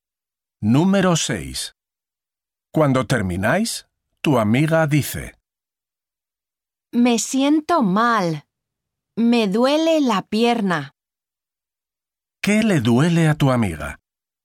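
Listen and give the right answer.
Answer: La pierna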